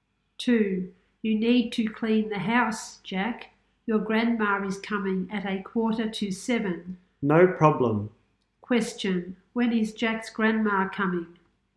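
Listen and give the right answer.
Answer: At 7:15.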